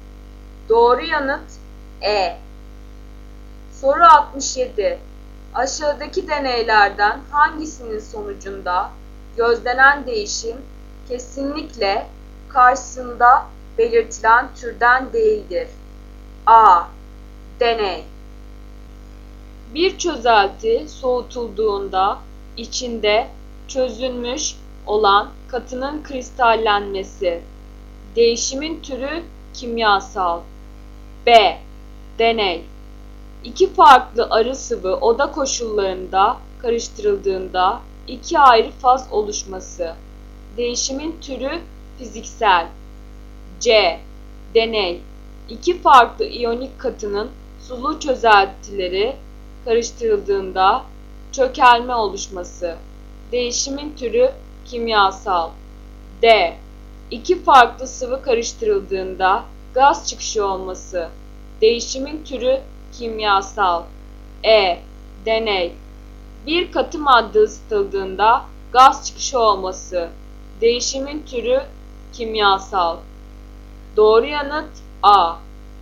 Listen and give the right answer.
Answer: Doğru yanıt A.